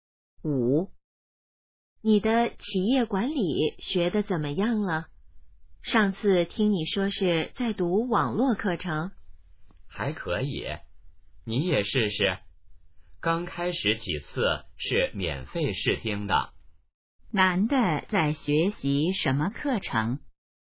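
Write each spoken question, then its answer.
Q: 男的在学习什么课程?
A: 企业管理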